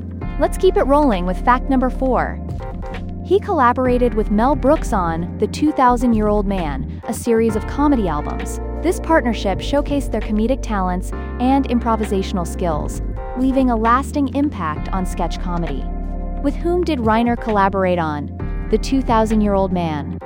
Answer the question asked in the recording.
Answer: Correct answer, Mel Brooks.